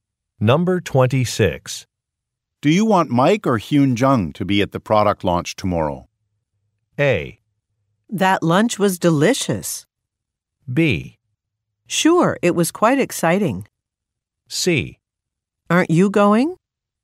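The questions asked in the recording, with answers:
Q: Do you want Mike or Hyun Jung to be at the product launch tomorrow?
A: C: Aren't you going?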